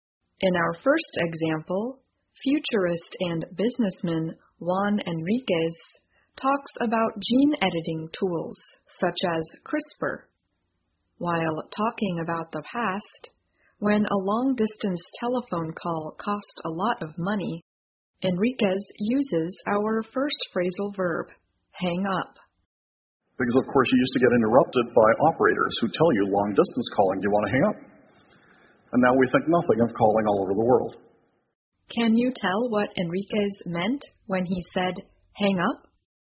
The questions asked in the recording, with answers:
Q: Can you tell what Enriquez meant when he said hang up?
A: to end or finish a phone call